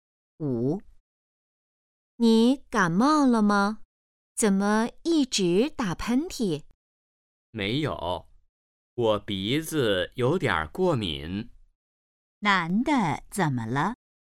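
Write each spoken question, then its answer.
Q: 男的怎么了?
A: 鼻子过敏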